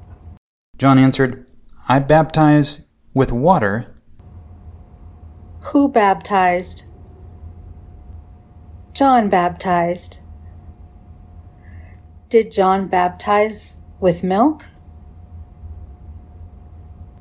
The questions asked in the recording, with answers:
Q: Did John baptize with milk?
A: No, John baptized with water.